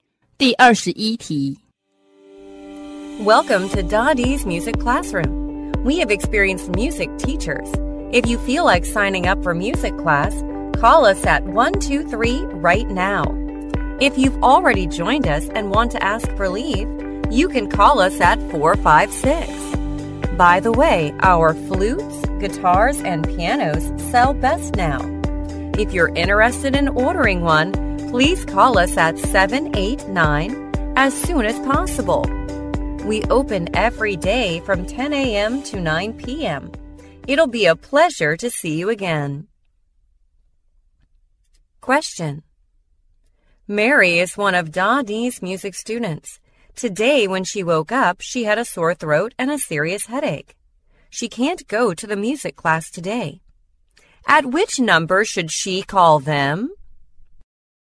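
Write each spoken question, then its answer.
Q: At which number should she call them?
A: 456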